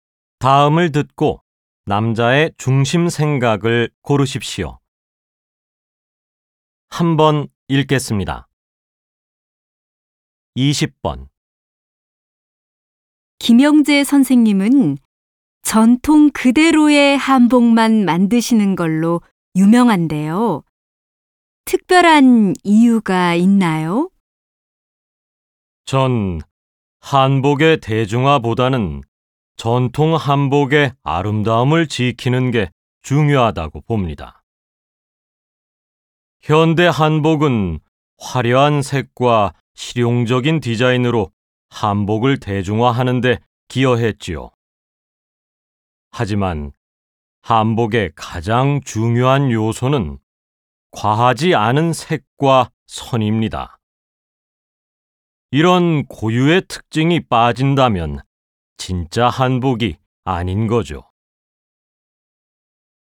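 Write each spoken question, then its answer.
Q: 다음을 듣고 남자의 중심 생각을 고르십시오.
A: 한복의 대중화보다 전통 한복의 아름다움을 지키는 것이 중요하다.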